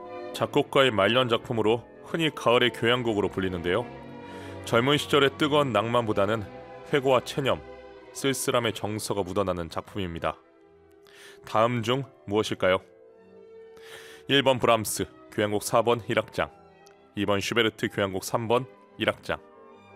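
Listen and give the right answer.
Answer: 1번: 브람스 교향곡 4번 1악장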